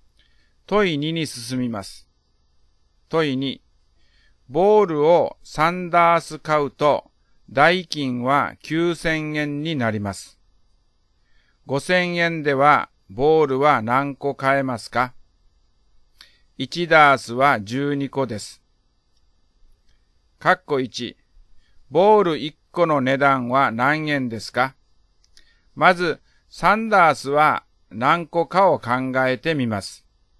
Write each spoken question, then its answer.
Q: 括弧1、ボール1個の値段は何円ですか?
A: 1個250円です。